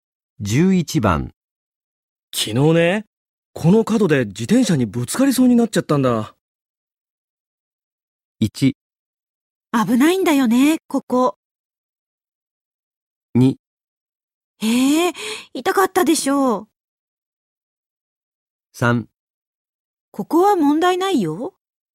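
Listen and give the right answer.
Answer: 1: 危ないんだよね、ここ。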